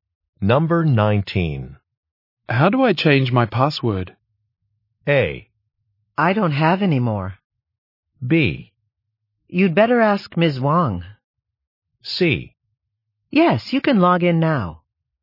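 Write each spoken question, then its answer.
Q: How do I change my password?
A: B: You'd better ask Ms. Wong.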